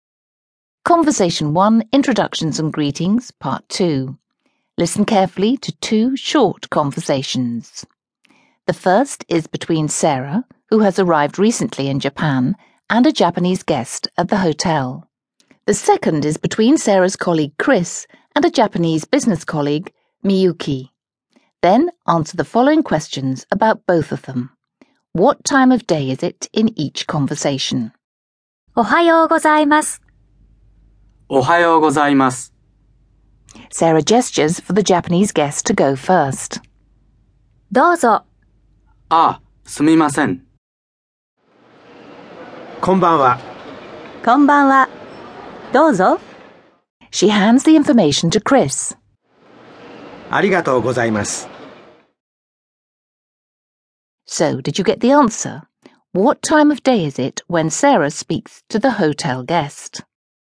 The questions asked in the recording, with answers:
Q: What time of day is it when Sarah speaks to the hotel guest?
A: It's the morning, well done.